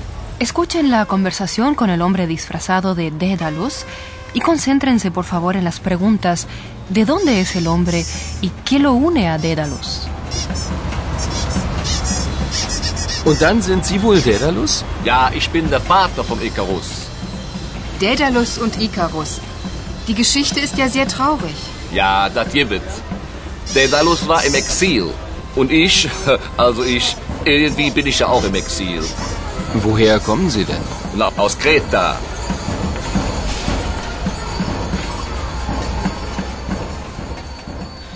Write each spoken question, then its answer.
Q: ¿de dónde es el hombre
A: ¿Creta? De allí proviene el hombre.

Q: qué lo une a Dédalus?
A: Y esto es lo que vincula al hombre disfrazado con el personaje de Dédalo.